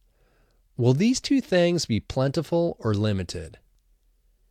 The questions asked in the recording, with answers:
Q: Will these two things be plentiful or limited?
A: These two things will be limited.